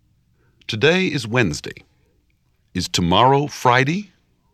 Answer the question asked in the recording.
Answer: No, it's not.